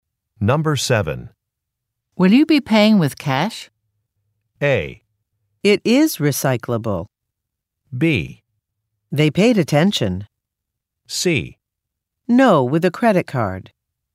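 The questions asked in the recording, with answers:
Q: Will you be paying with cash?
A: C: No, with a credit card.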